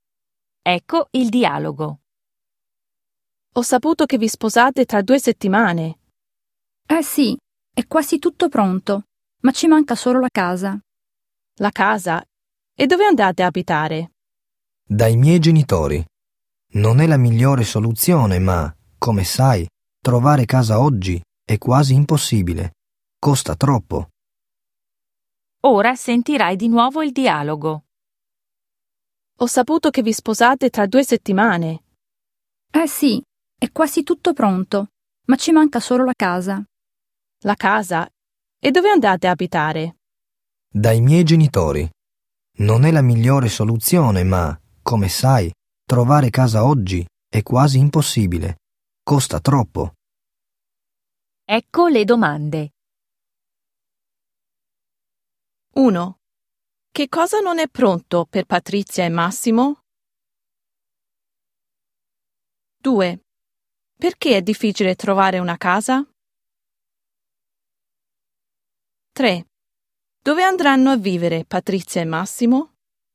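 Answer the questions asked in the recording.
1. La casa
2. Costa troppo
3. Dai genitori di uno di loro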